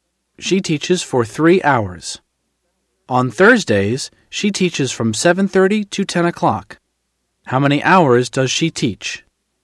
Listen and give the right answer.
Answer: She teaches for 2.5 hours.